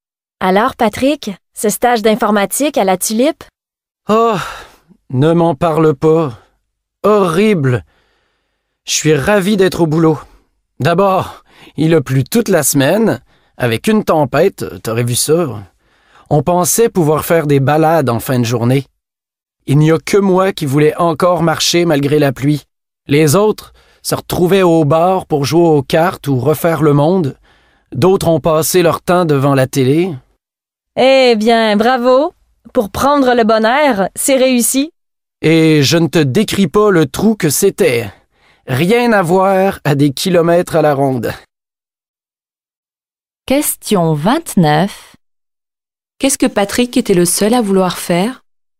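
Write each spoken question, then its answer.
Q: Qu'est-ce que Patrick était le seul à vouloir faire?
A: Se promener (marcher) malgré la pluie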